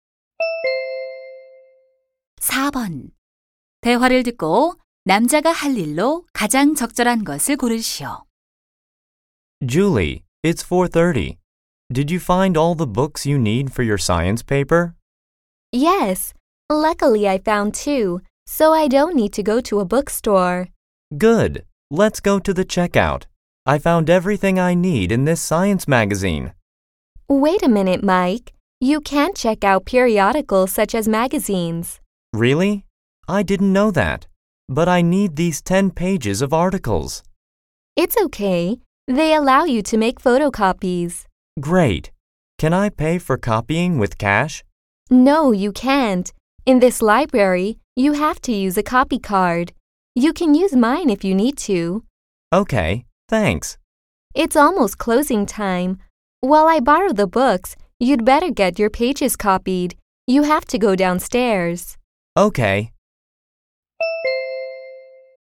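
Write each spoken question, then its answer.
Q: 대화를 듣고 남자가 할 일로 가장 적절한 것을 고르시오.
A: 잡지 기사 복사하기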